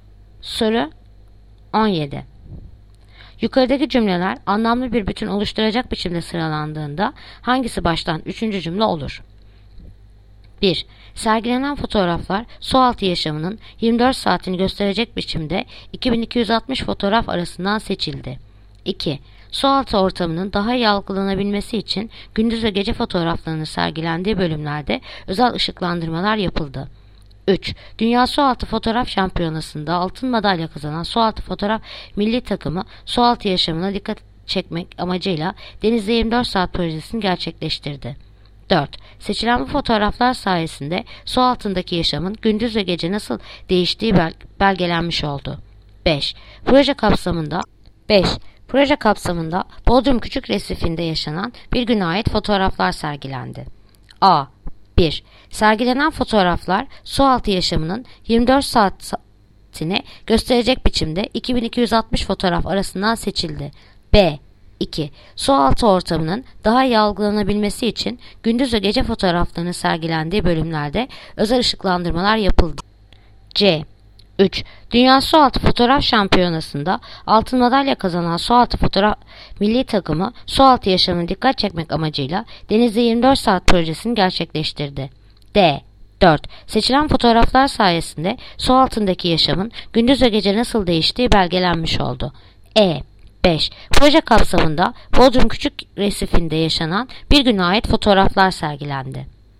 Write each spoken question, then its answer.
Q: Yukarıdaki cümleler anlamlı bir bütün oluşturacak biçimde sıralandığında hangisi baştan üçüncü cümle olur?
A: Adana. 1. Sergilenen fotoğraflar su altı yaşamının 24 saatini gösterecek biçimde 2260 fotoğraf arasından seçildi.